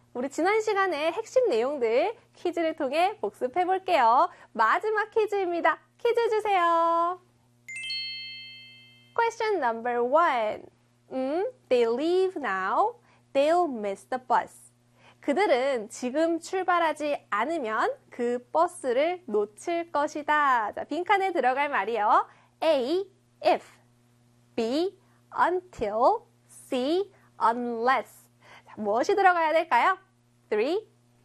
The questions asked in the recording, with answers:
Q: 자, 빈칸에 들어갈 말이요. A, if. B, until.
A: 네, 정답은 바로 C에 unless가 들어가야겠죠.